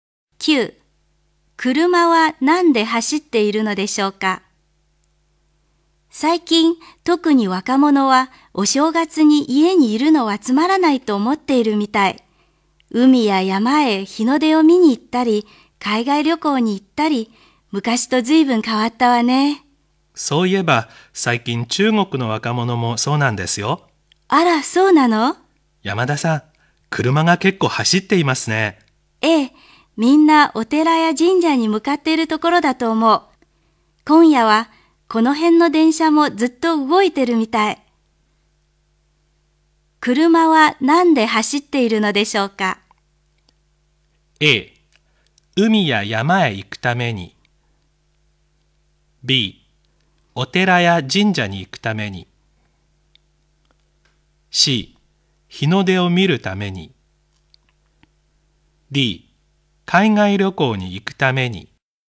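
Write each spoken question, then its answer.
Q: 車は何で走っているのでしょうか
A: B: お寺や神社に行くために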